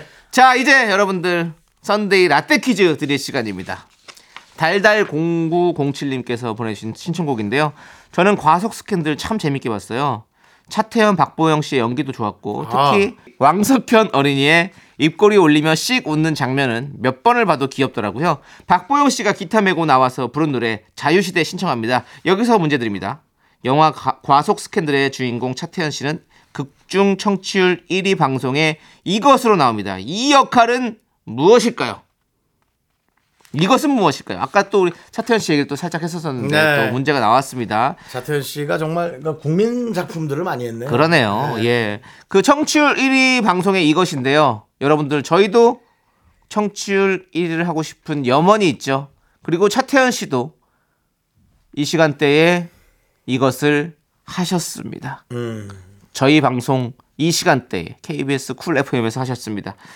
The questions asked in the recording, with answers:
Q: 이 역할은 무엇일까요?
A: 극중 차태현 씨는 청취율 1위 방송에 라디오 DJ로 나옵니다.